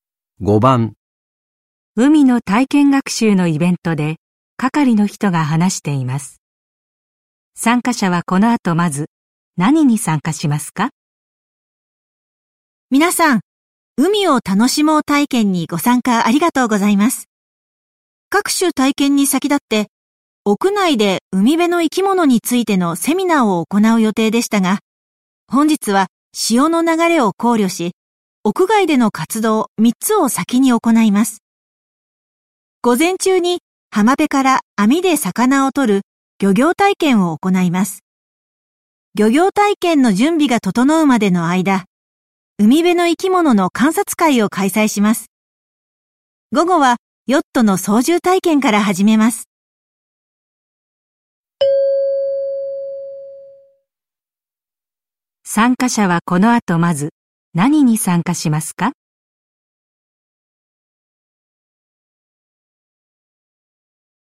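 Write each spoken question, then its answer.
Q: 参加者はこの後まず何に参加しますか?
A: 海辺の生き物の観察会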